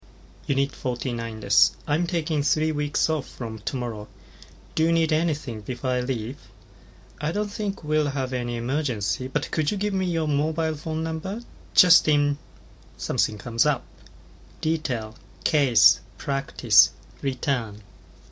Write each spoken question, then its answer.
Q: Just in something comes up.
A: 正解は B の case です。